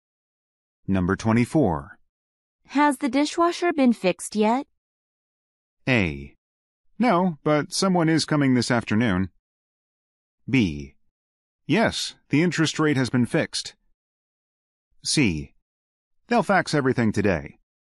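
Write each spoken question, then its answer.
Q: Has the dishwasher been fixed yet?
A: A: No, but someone is coming this afternoon.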